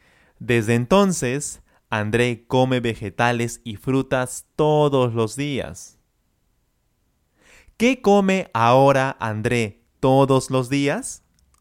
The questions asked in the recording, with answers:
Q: ¿Qué come ahora André todos los días?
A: Ahora, André come vegetales y frutas todos los días.